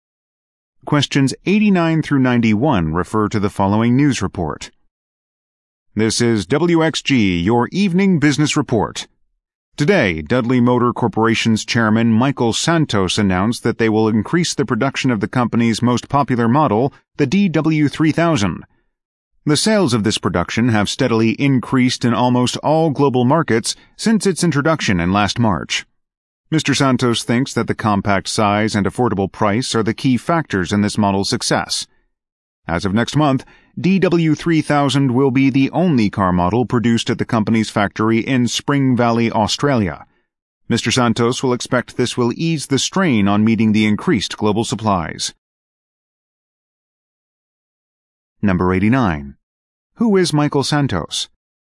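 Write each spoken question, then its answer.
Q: Who is Michael Santos?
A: Chairman of Dudley Motor Corporation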